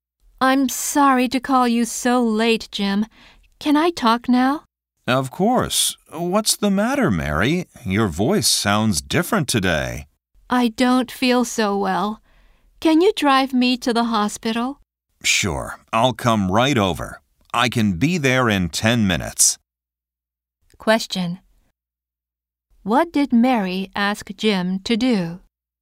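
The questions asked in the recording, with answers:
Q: What did Mary ask Jim to do?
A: Drive her to the hospital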